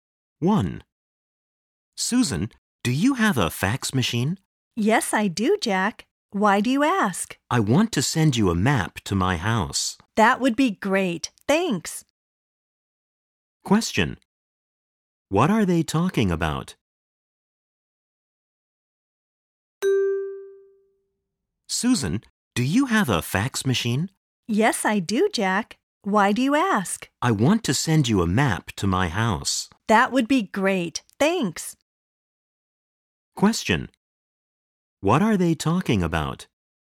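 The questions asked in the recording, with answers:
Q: What are they talking about?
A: Jack sending Susan a map to his house by fax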